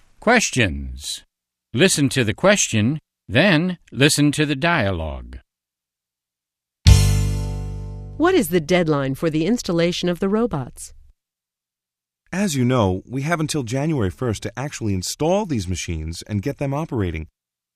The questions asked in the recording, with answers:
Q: What is the deadline for the installation of the robots?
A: They need to be installed by January 1st.